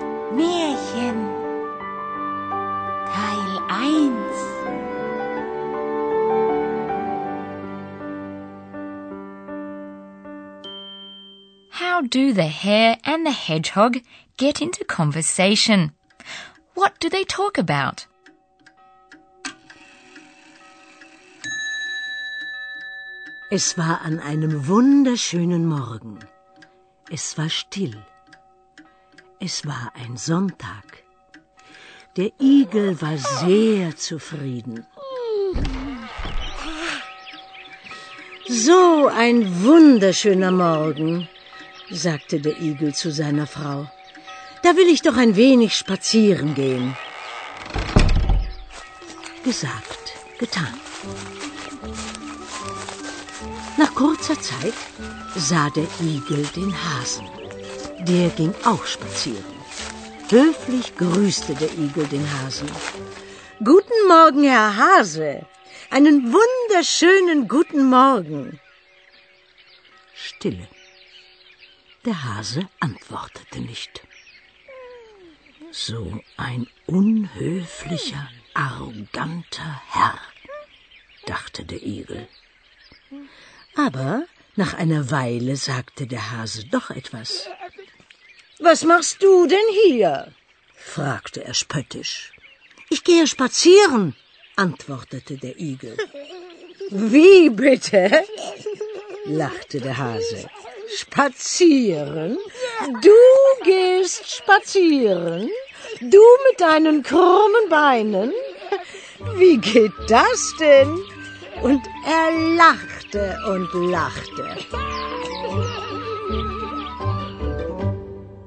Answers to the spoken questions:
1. The hare, probably the hedgehog's neighbor, had the same idea.
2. Going for a walk. Spazieren gehen.